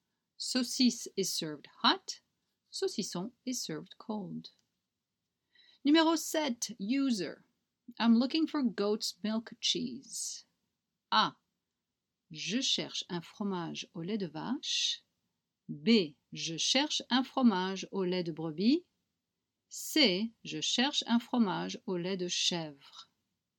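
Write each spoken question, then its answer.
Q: I'm looking for goat's milk cheese.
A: C: Je cherche un fromage au lait de chèvre.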